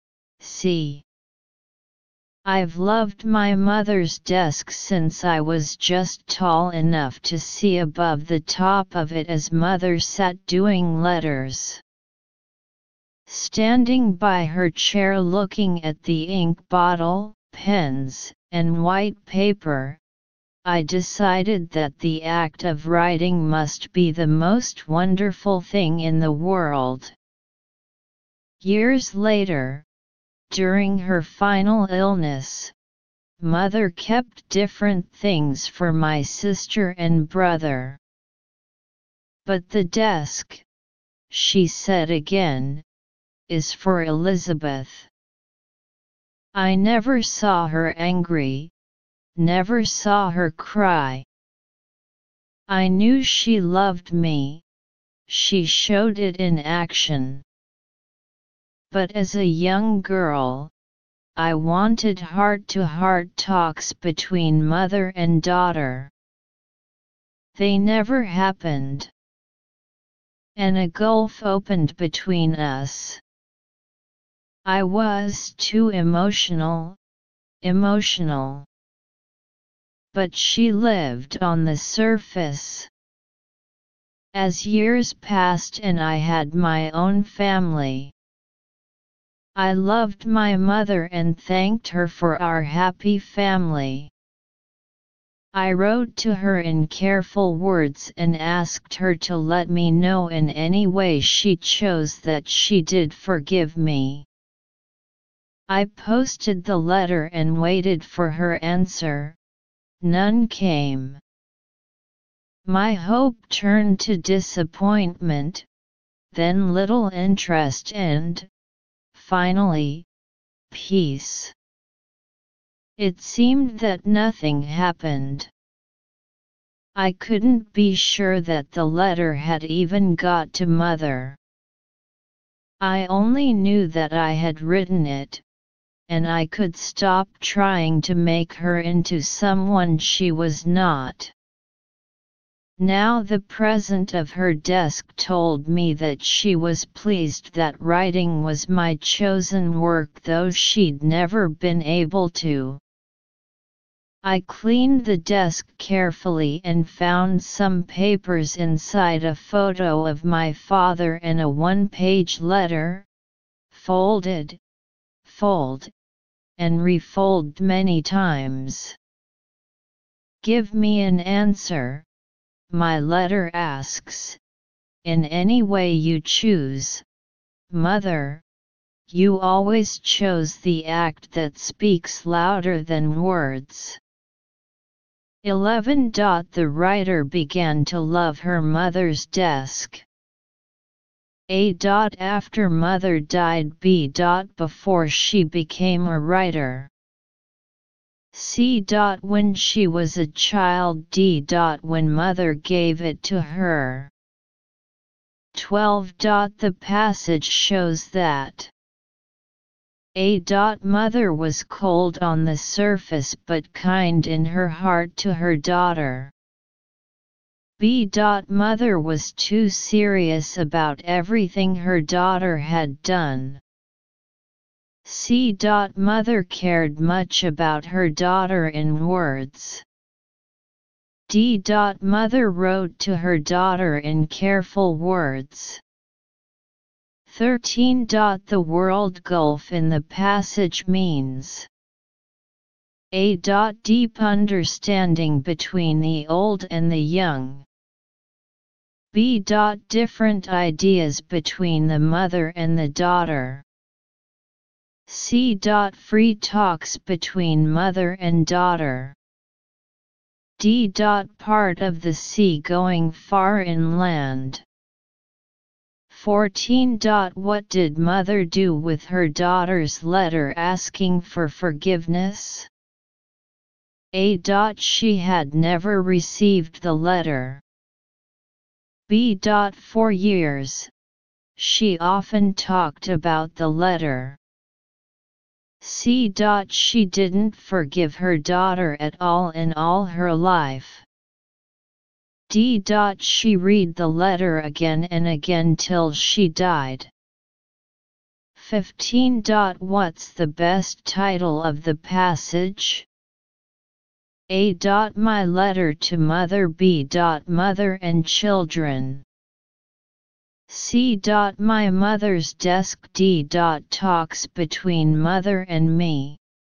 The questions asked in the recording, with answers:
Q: The passage shows that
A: 12. A.

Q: What did mother do with her daughter's letter asking for forgiveness?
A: 14. D.

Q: What's the best title of the passage?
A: 15. C.